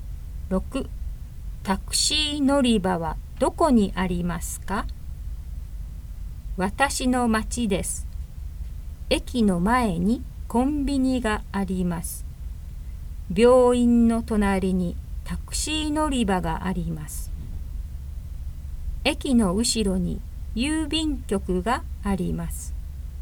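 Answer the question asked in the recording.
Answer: 病院の隣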